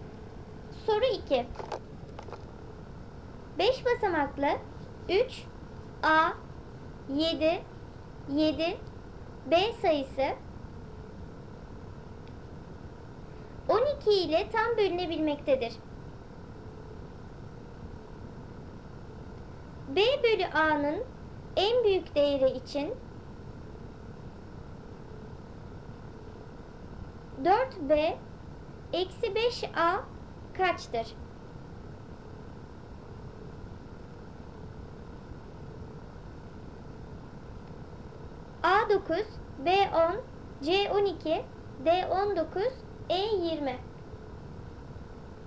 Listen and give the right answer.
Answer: Doğru cevap D19.